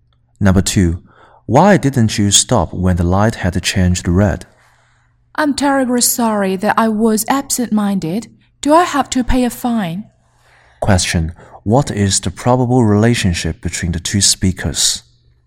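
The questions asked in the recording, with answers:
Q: What is the probable relationship between the two speakers?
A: Policeman and driver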